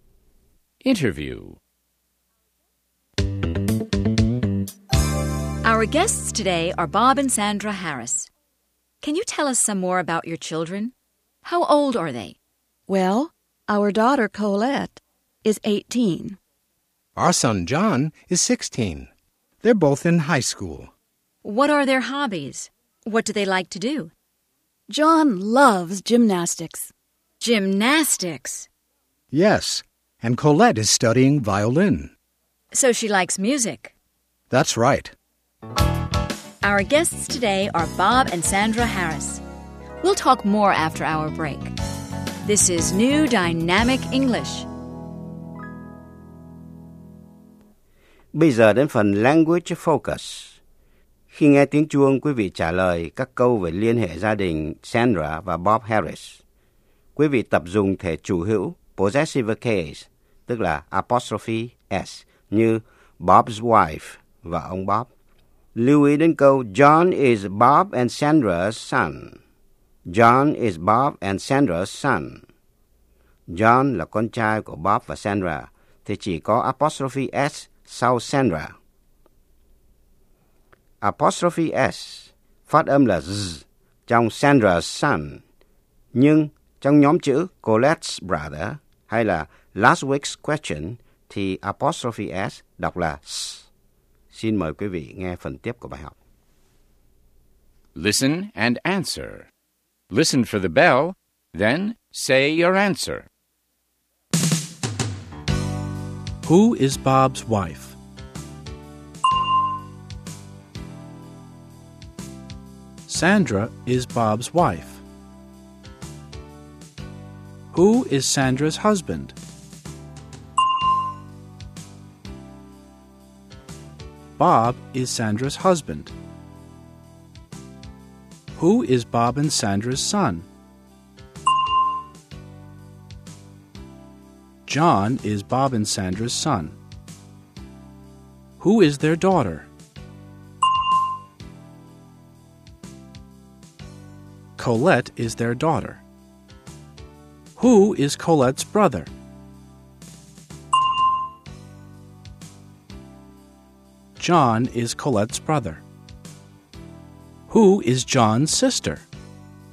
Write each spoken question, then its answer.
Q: Who is Bob's wife?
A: Sandra is Bob's wife.

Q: Who is Sandra's husband?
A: Bob is Sandra's husband.

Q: Who is Bob and Sandra's son?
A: John is Bob and Sandra's son.

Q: Who is their daughter?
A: Colette is their daughter.

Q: Who is John's sister?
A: Colette is John's sister.